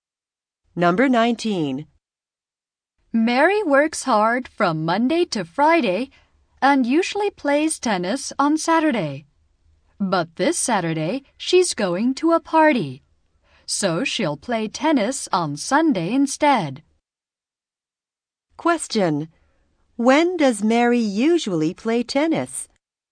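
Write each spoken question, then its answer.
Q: When does Mary usually play tennis?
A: On Saturday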